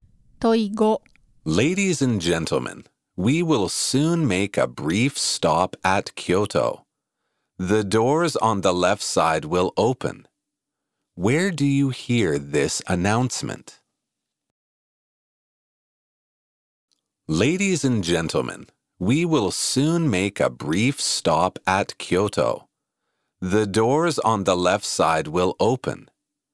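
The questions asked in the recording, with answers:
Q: Where do you hear this announcement?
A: On a train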